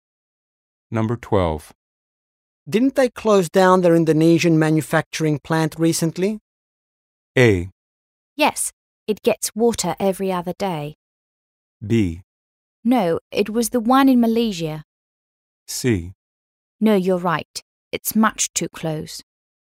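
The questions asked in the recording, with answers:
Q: Didn't they close down their Indonesian manufacturing plant recently?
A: B: No, it was the one in Malaysia.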